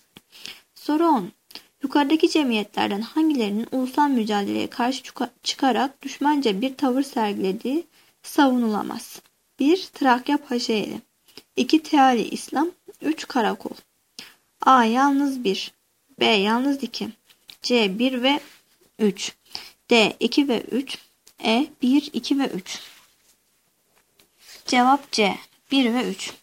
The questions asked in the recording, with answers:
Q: Yukarıdaki cemiyetlerden hangilerinin ulusal mücadeleye karşı çıkarak düşmanca bir tavır sergilediği savunulamaz?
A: Cevap C. 1 ve 3.